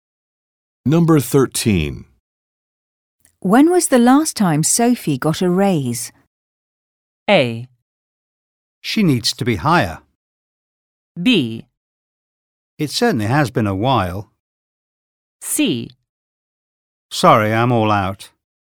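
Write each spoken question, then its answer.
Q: When was the last time Sophie got a raise?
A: B: It certainly has been a while.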